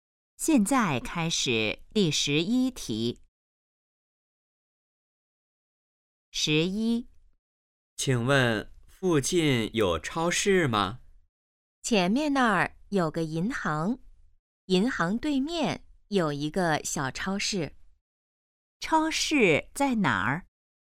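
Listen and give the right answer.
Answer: 银行对面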